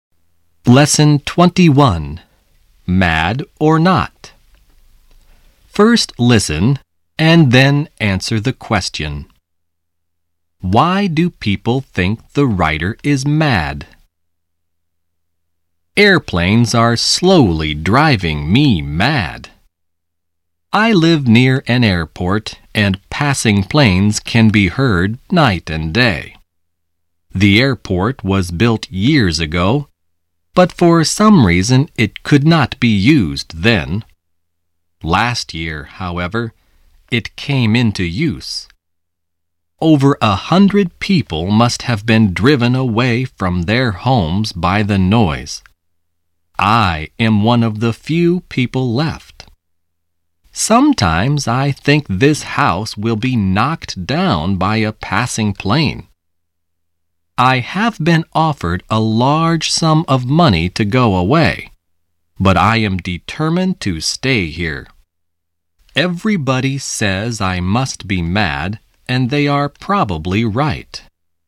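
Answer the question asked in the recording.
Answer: Because he is determined to stay in his house near the noisy airport even though he has been offered a large sum of money to go away.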